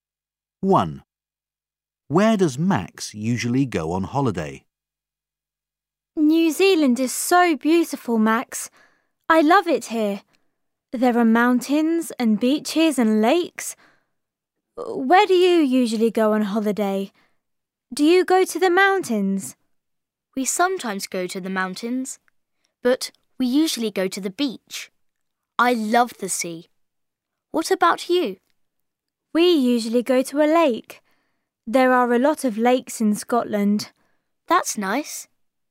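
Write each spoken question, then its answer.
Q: Where does Max usually go on holiday?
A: to the beach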